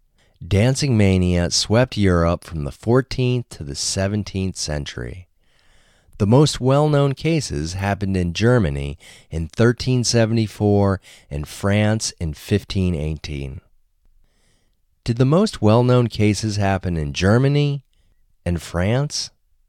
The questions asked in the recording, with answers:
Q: Did the most well-known cases happen in Germany and France?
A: Yes, the most well-known cases happened in Germany and France.